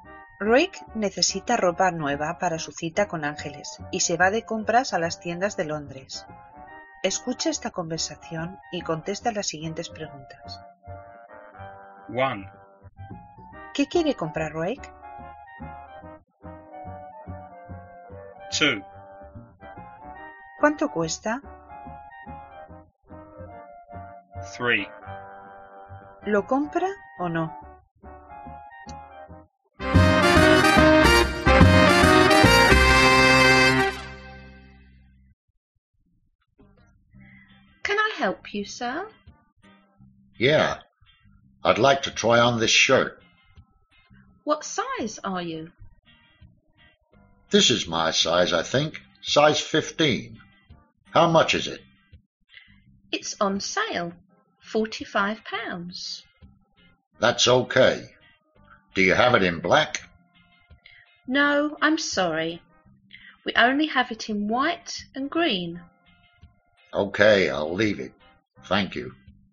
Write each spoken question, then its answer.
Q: ¿Qué quiere comprar Rick?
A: A shirt.

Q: ¿Cuánto cuesta?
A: £45.

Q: ¿Lo compra o no?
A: I'll leave it.